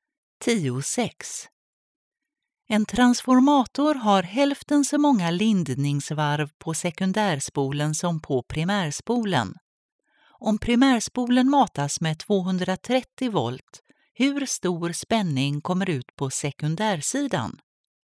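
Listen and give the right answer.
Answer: 115 volt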